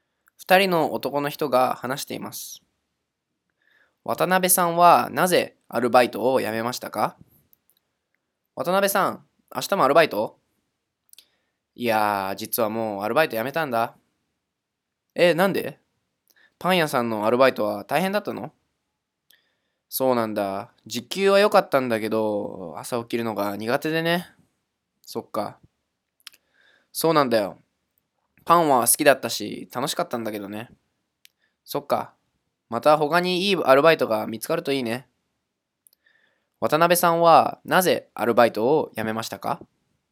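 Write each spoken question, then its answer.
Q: 渡辺さんはなぜアルバイトを辞めましたか?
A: 朝起きるのが苦手だから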